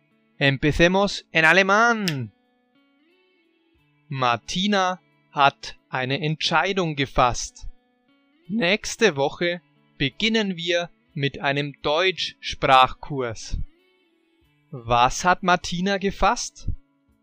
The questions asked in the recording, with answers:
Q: Was hat Martina gefasst?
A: Eine Entscheidung.